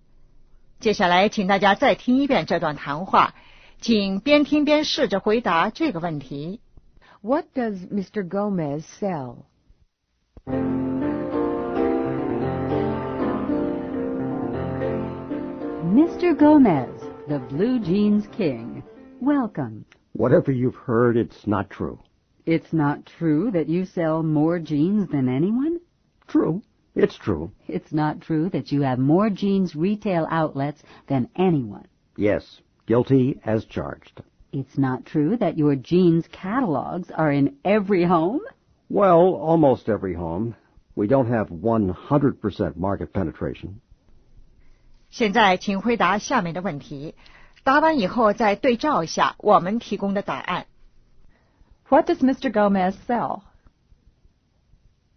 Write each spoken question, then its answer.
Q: What does Mr. Gomez sell?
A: Blue jeans.